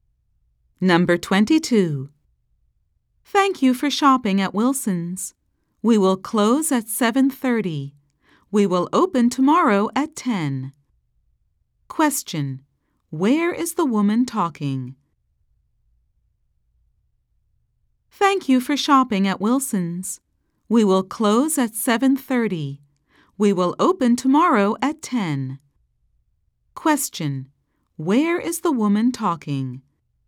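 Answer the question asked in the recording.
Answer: At a store (Wilson's)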